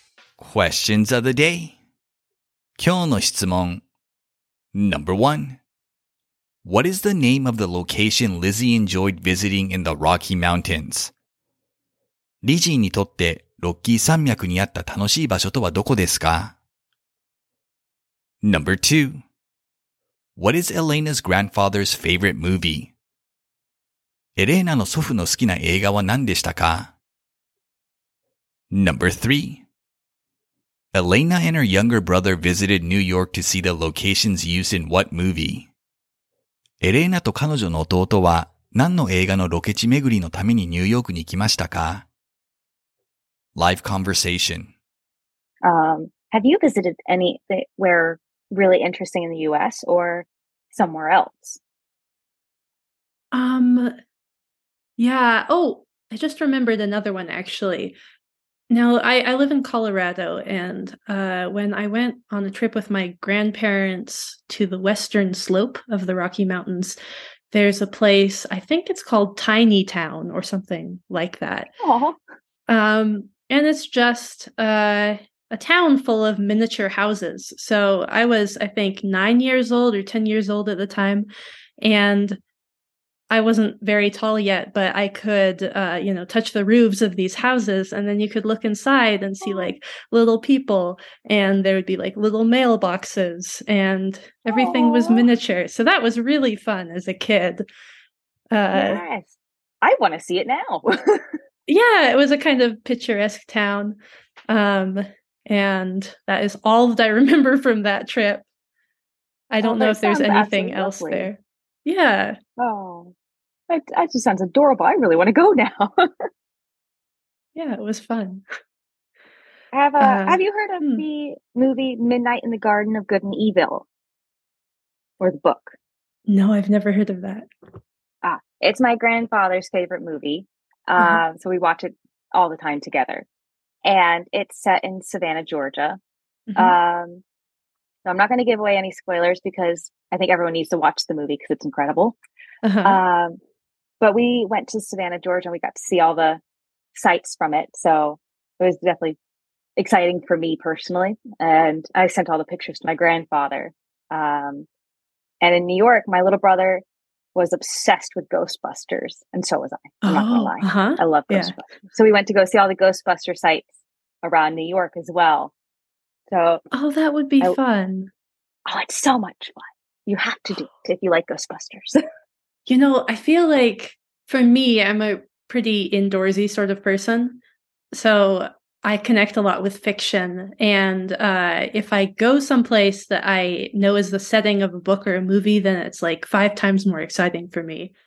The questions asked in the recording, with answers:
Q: What is the name of the location Lizzie enjoyed visiting in the Rocky Mountains?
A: She enjoyed visiting a place called Tiny Town, where there are miniature houses on display.

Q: What is Elena's grandfather's favorite movie?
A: His favorite movie was Midnight in the Garden of Good and Evil, an adaptation of the novel of the same name.

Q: Elena and her younger brother visited New York to see the locations used in what movie?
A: They went to New York to see the locations of the film Ghostbusters.